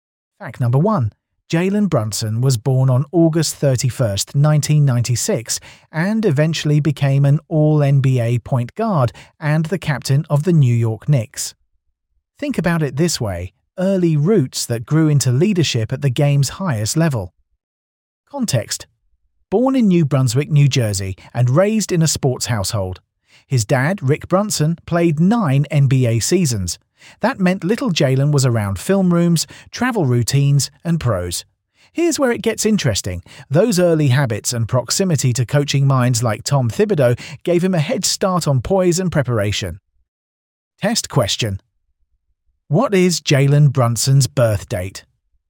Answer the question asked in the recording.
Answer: Correct answer. August 31st, 1996.